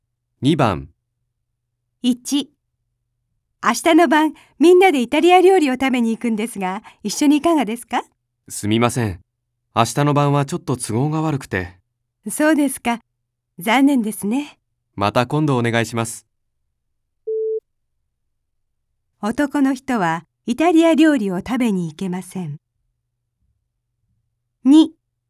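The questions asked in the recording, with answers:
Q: 男の人はイタリア料理を食べに行けません。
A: ○(正しい)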